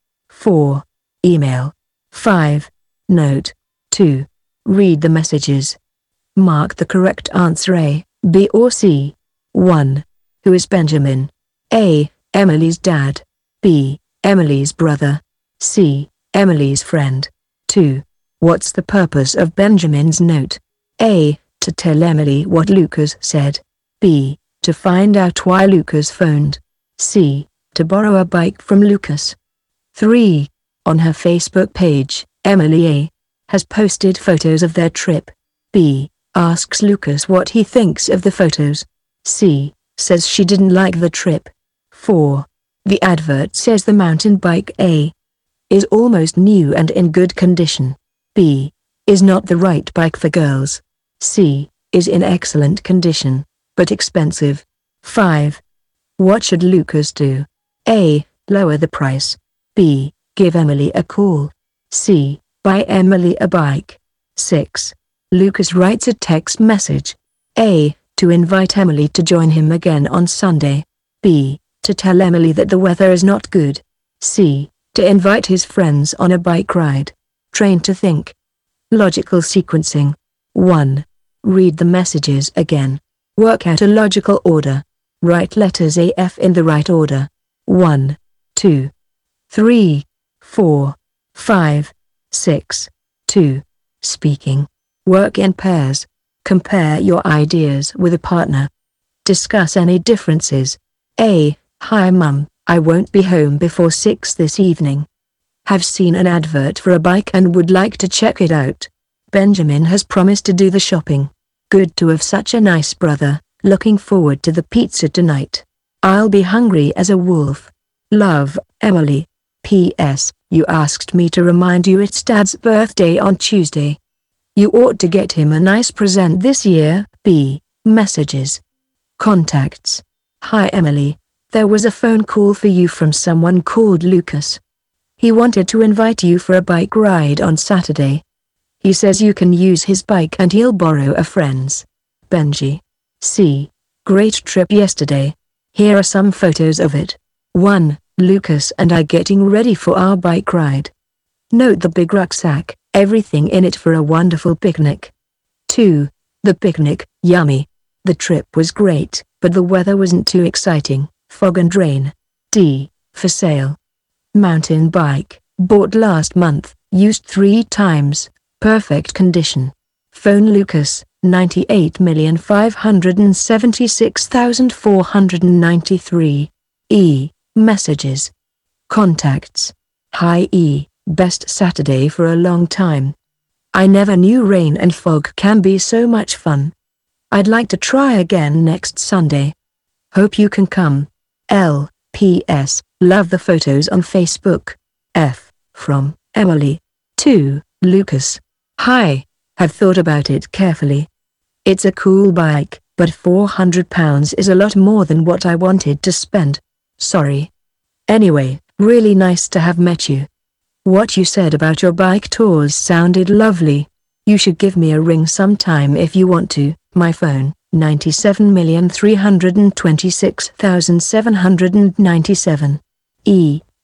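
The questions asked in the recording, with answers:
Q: Who is Benjamin?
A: B: Emily's brother.

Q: What's the purpose of Benjamin's note?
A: A: To tell Emily what Lucas said.

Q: On her Facebook page, Emily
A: A: has posted photos of their trip.

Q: The advert says the mountain bike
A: A: is almost new and in good condition.

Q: What should Lucas do?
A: B: Give Emily a call.

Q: Lucas writes a text message.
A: A: To invite Emily to join him again on Sunday.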